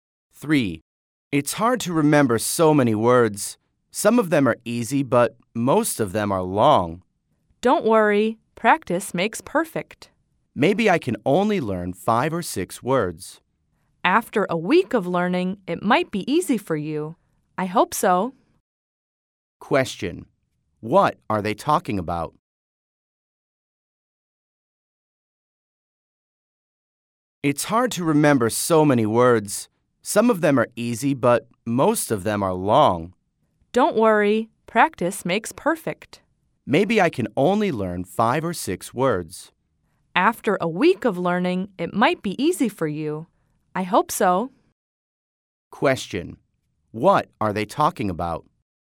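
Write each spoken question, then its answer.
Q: What are they talking about?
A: Learning/remembering words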